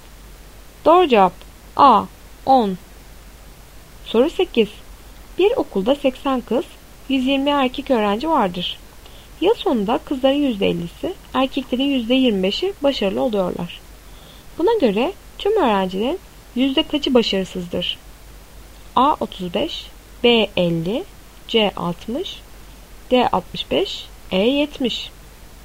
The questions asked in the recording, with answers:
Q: Buna göre tüm öğrencilerin yüzde kaçı başarısızdır?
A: Doğru cevap D 65.